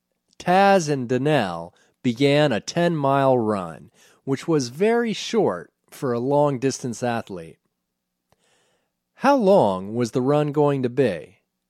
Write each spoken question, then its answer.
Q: How long was the run going to be?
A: The run was going to be 10 miles.